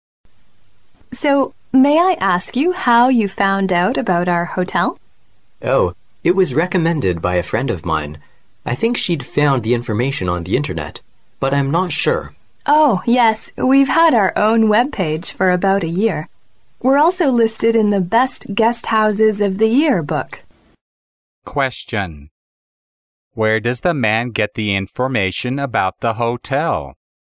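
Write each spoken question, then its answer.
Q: Question. Where does the man get the information about the hotel?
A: From a friend who recommended it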